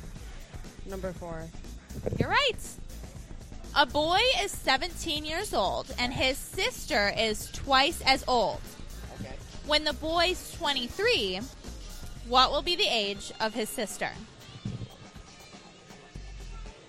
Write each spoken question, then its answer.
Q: When the boy's 23, what will be the age of his sister?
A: 40.